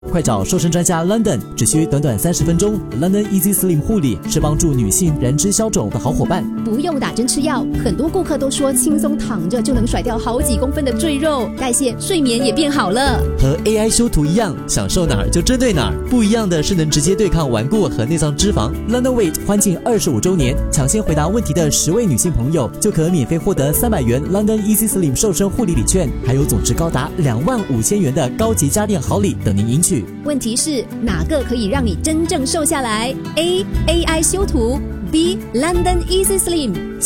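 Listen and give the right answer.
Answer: B: London Easy Slim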